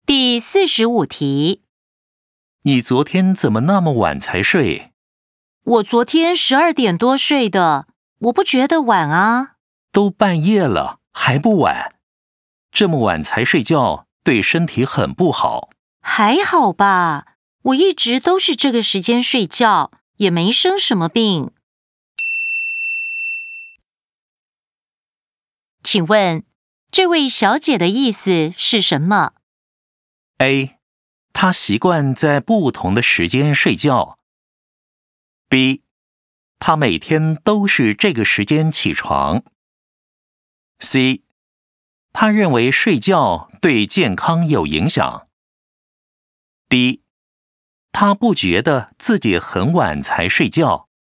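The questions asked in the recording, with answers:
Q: 请问,这位小姐的意思是什么?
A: D: 她不觉得自己很晚才睡觉。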